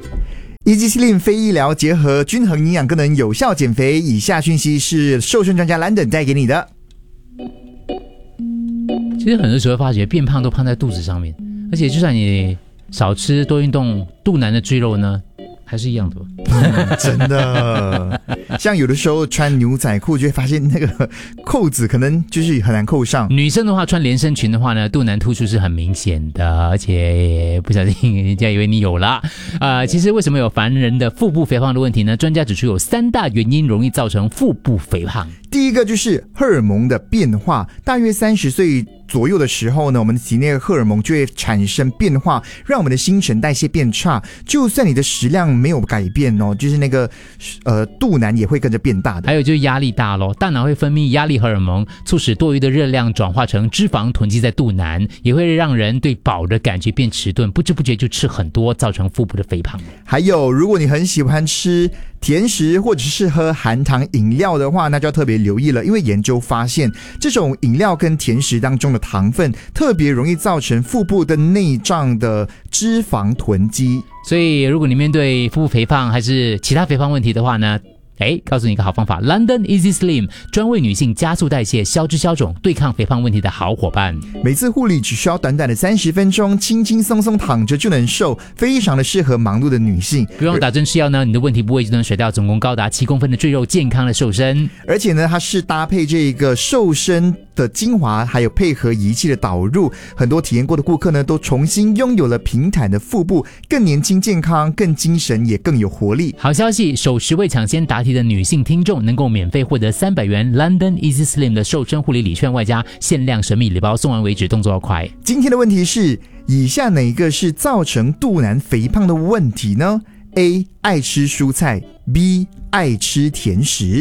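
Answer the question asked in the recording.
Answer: B: 爱吃甜食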